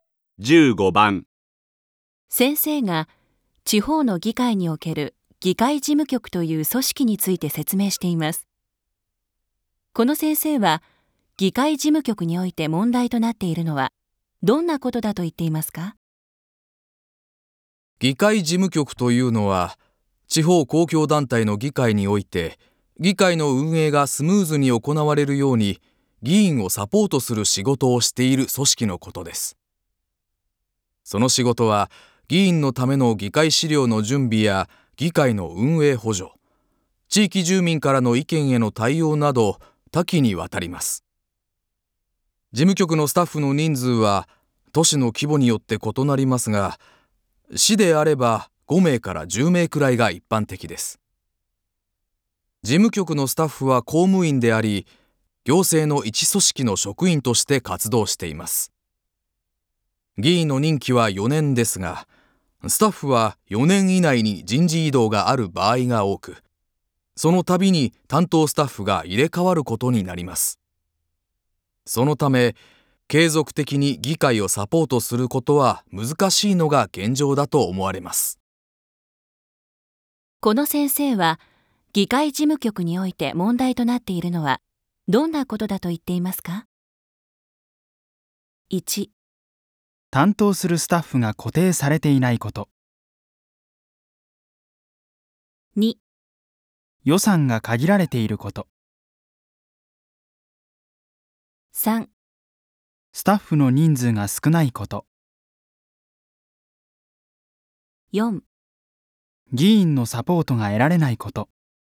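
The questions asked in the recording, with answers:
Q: この先生は議会事務局において問題となっているのはどんなことだと言っていますか?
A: 1: 担当するスタッフが固定されていないこと。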